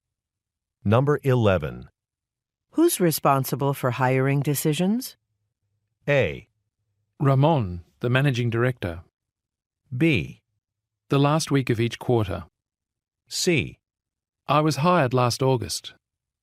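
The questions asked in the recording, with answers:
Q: Who's responsible for hiring decisions?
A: A: Ramon, the managing director.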